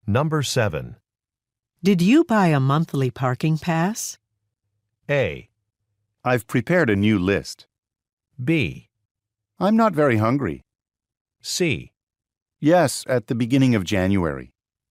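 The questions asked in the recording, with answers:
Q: Did you buy a monthly parking pass?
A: C: Yes, at the beginning of January.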